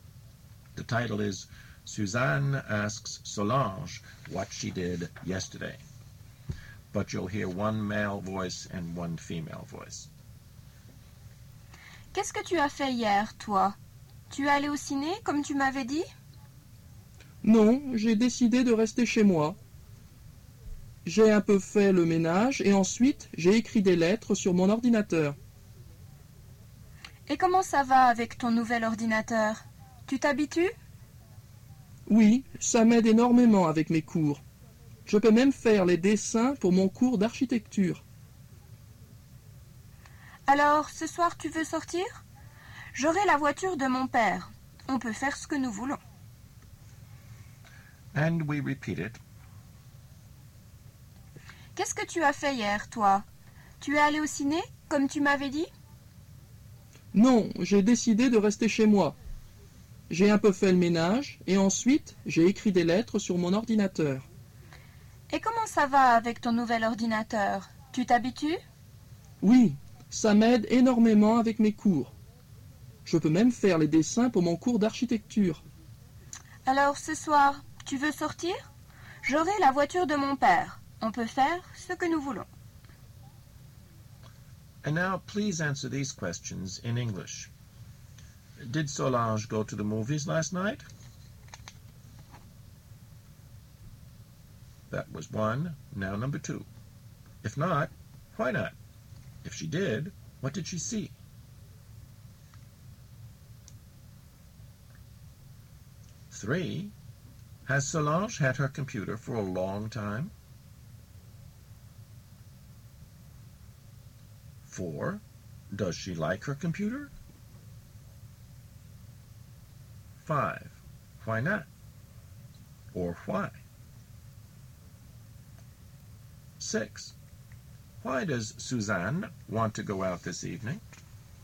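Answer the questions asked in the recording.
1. No
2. She decided to stay home (cleaned a bit and wrote letters on her computer)
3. No, it is new
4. Yes
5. It helps her enormously with her courses; she can even do drawings for her architecture course
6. She will have her father's car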